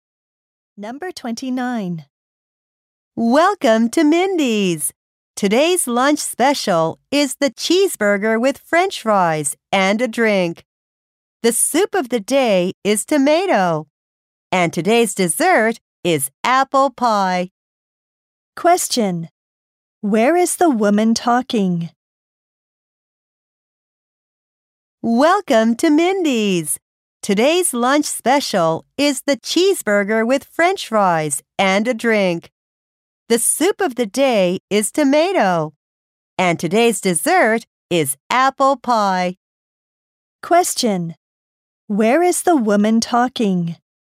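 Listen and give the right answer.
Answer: At a restaurant.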